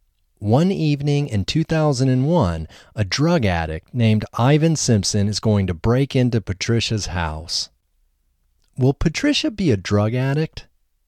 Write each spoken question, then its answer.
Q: Will Patricia be a drug addict?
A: No, Patricia won't be a drug addict.